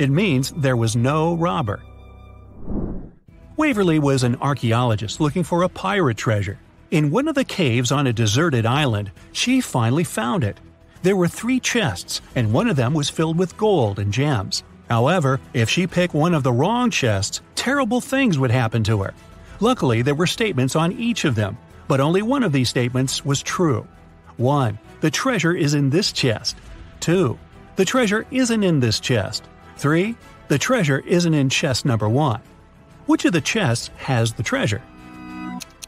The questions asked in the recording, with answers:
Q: Which of the chests has the treasure?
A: the treasure is in the second chest.